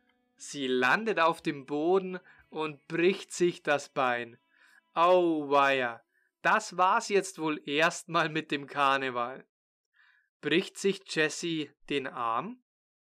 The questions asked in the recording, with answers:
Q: Bricht sich Jesse den Arm?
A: Nein, sie bricht sich nicht den Arm, sie bricht sich das Bein.